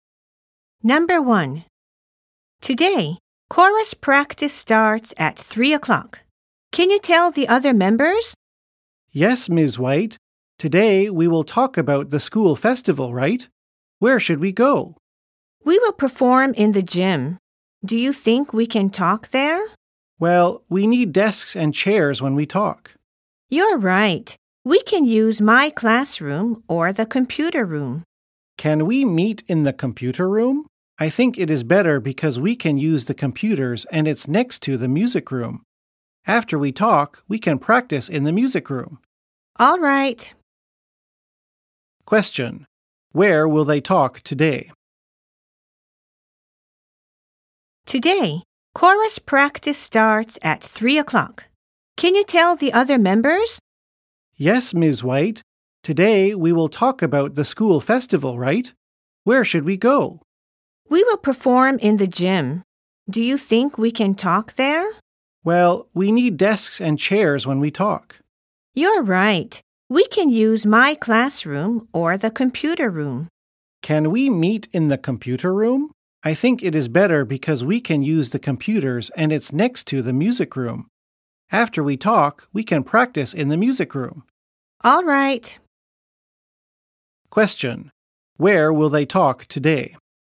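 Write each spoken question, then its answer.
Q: Where will they talk today?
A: In the computer room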